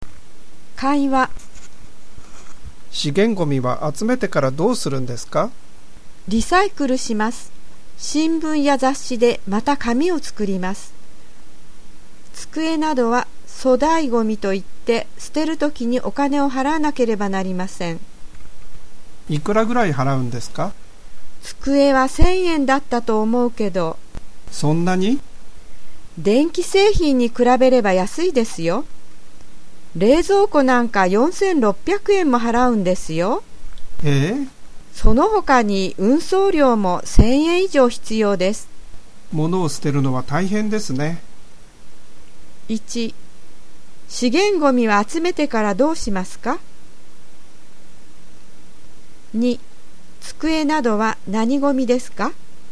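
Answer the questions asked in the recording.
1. リサイクルします
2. 粗大ゴミ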